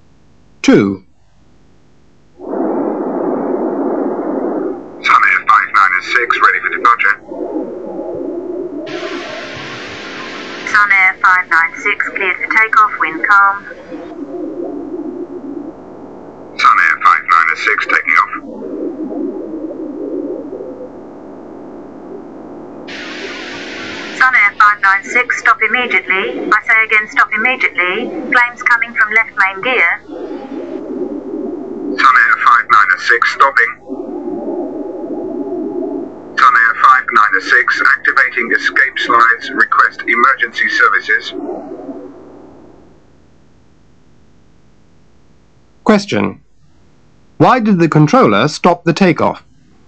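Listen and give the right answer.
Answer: Flames coming from the left main gear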